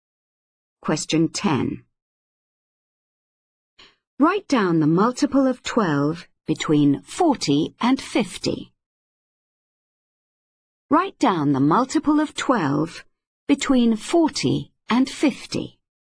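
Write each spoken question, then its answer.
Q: Write down the multiple of 12 between 40 and 50.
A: 48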